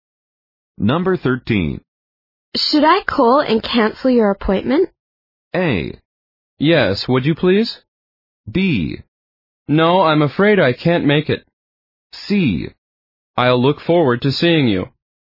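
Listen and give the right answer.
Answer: A: Yes, would you please?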